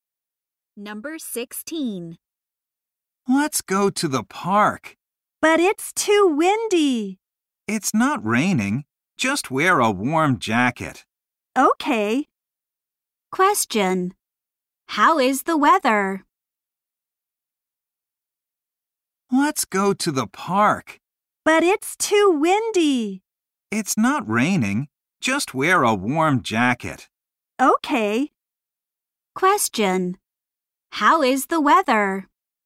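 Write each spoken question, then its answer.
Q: Question. How is the weather?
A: It's windy.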